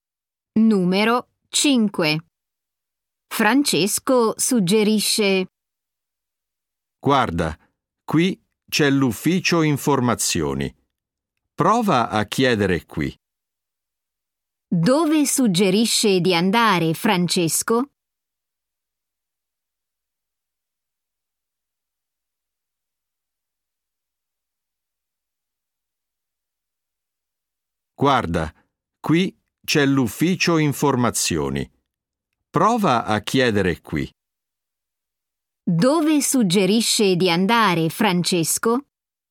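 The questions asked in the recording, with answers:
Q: Dove suggerisce di andare Francesco?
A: All'ufficio informazioni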